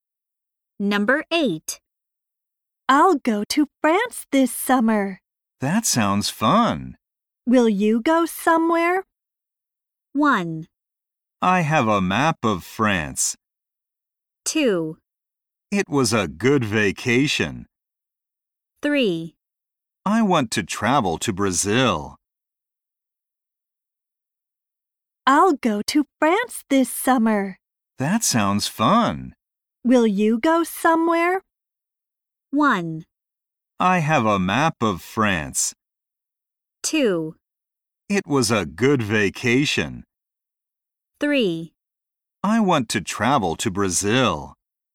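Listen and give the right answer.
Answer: 3: I want to travel to Brazil.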